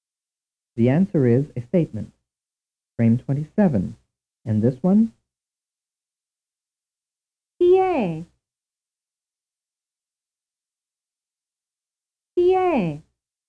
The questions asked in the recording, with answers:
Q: And this one?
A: The answer is a question.